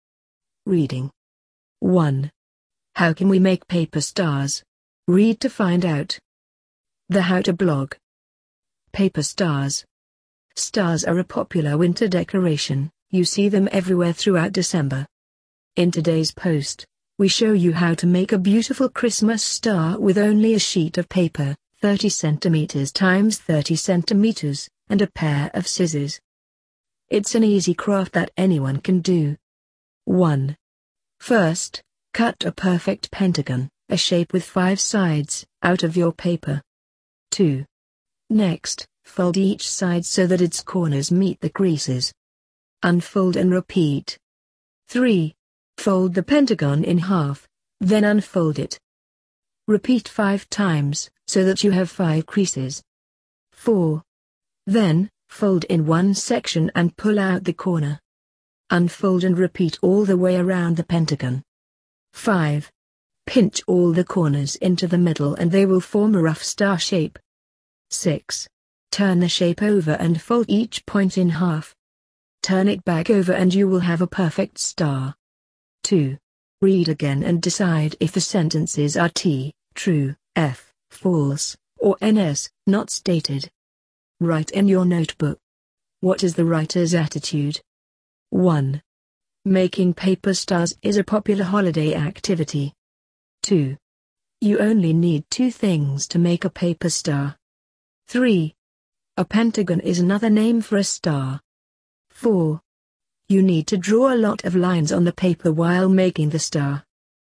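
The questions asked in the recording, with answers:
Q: You only need 2 things to make a paper star.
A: T (true)

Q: A pentagon is another name for a star.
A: F (false)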